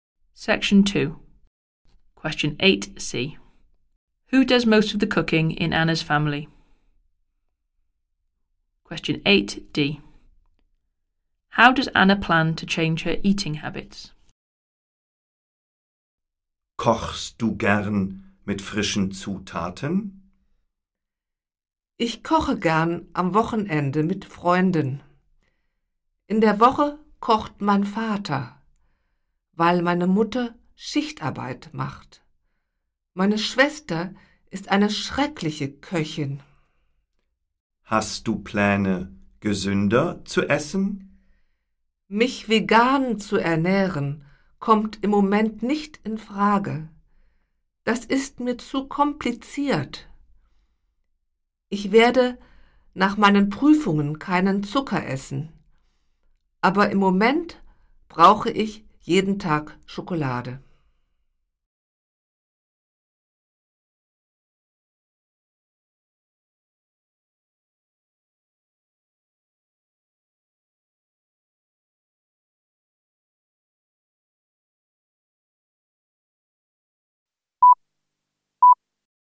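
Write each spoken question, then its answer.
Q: Who does most of the cooking in Anna's family?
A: Her father

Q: How does Anna plan to change her eating habits?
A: She will eat no sugar after her exams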